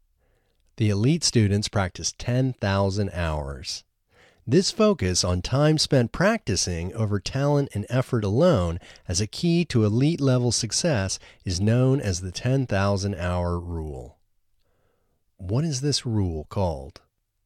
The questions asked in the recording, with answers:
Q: What is this rule called?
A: This rule is called the 10,000-hour rule.